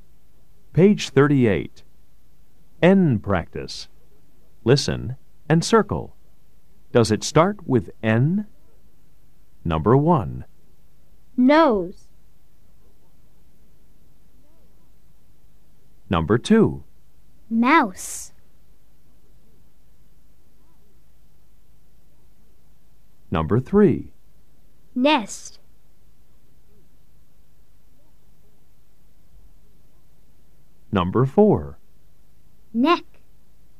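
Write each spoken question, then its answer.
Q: Mouse.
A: No

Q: Nest.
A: Yes

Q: Neck.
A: Yes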